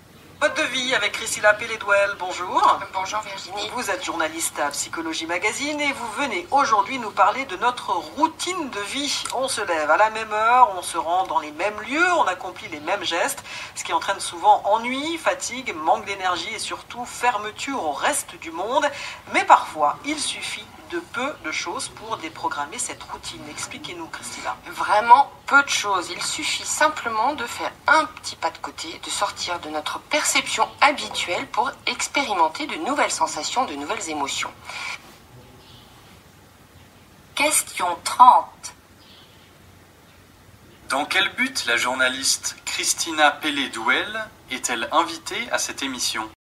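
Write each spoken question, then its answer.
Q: Dans quel but la journaliste Christina Pelédouel est-elle invitée à cette émission ?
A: Pour parler de notre routine de vie et de comment la déprogrammer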